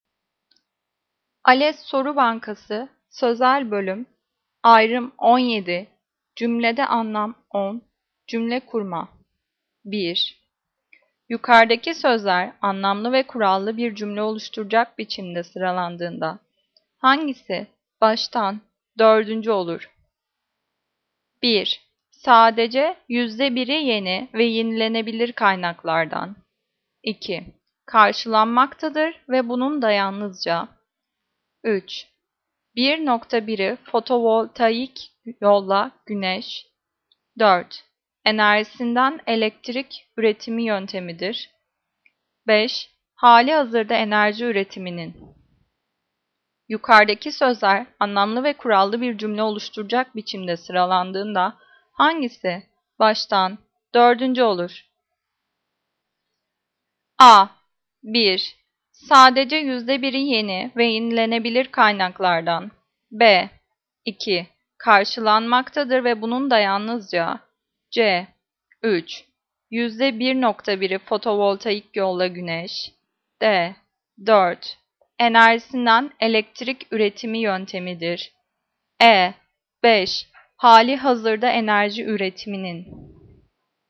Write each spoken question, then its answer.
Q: Yukarıdaki sözler anlamlı ve kurallı bir cümle oluşturacak biçimde sıralandığında hangisi baştan dördüncü olur?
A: Cevap C. 3. 1.1'i fotovoltaik yolla güneş.